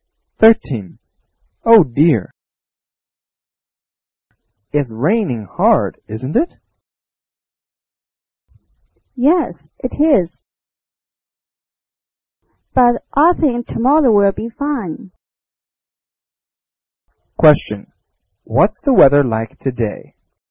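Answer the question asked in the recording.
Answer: It's raining hard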